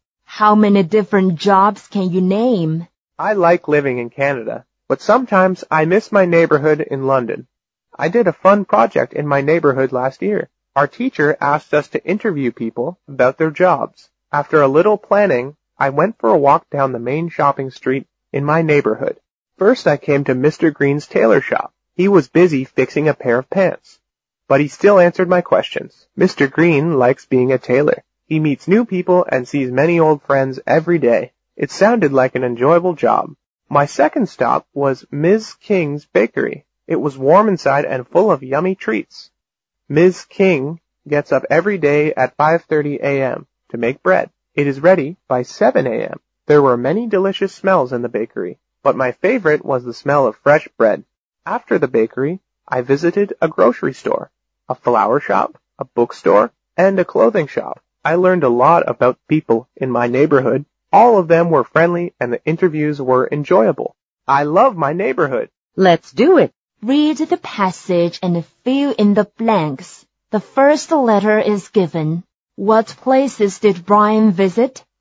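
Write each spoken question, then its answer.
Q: What places did Brian visit?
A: Mr. Green's tailor shop, Ms. King's bakery, a grocery store, a flower shop, a bookstore and a clothing shop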